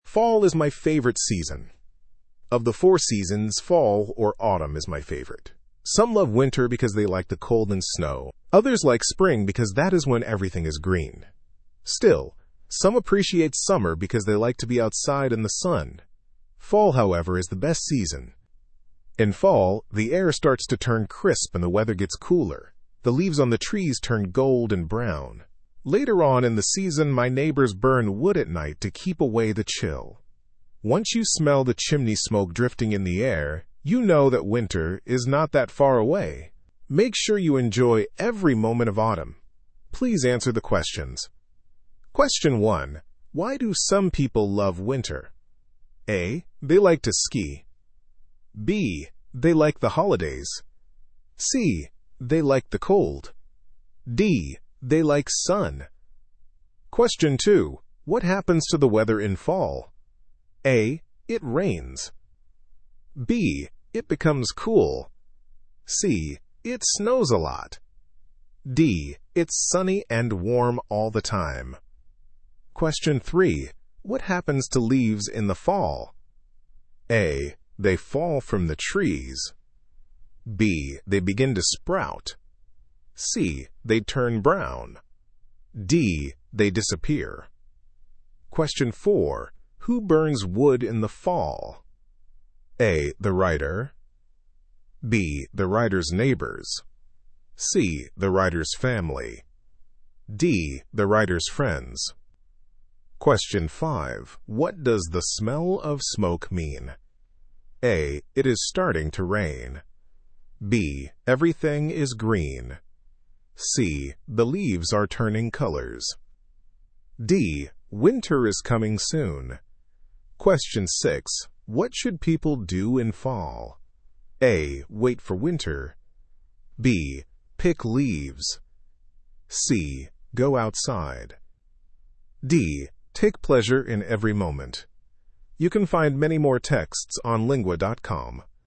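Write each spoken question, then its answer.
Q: Why do some people love winter?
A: C: They like the cold.

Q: What happens to the weather in fall?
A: B: It becomes cool.

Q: What happens to leaves in the fall?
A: C: They turn brown.

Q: Who burns wood in the fall?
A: B: The writer's neighbors.

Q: What does the smell of smoke mean?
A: D: Winter is coming soon.

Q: What should people do in fall?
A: D: Take pleasure in every moment.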